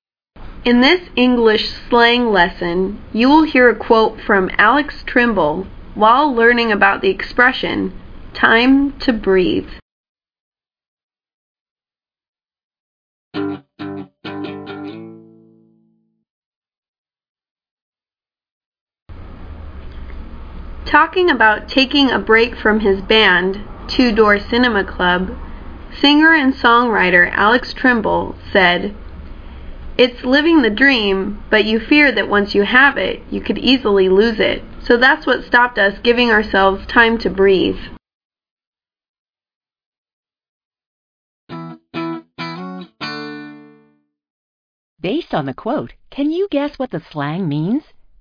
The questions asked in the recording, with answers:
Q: Based on the quote, can you guess what the slang means?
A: Time to breathe is an expression meaning space to relax.